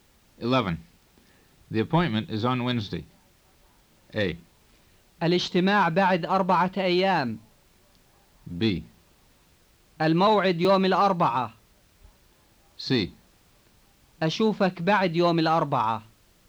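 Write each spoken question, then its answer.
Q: The appointment is on Wednesday.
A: B: الموعد يوم الأربعاء.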